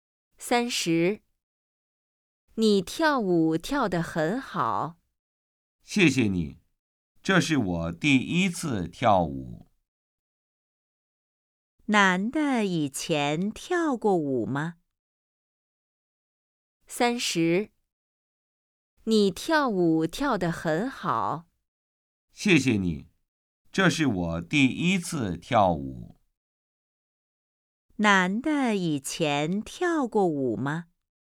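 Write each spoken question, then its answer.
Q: 男的以前跳过舞吗?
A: 没有,这是第一次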